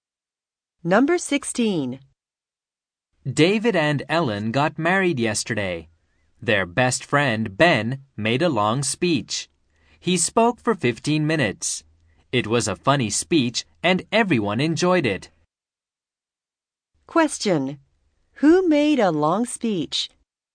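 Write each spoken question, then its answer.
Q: Who made a long speech?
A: Ben, their best friend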